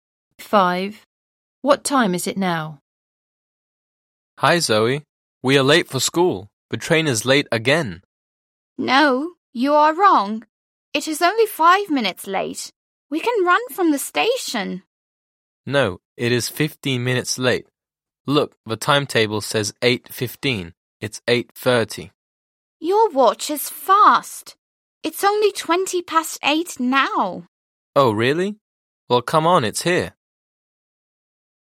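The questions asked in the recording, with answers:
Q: What time is it now?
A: 8:20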